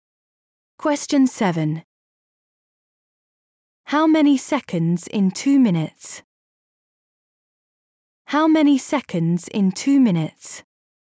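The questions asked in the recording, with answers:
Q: How many seconds in 2 minutes?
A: 120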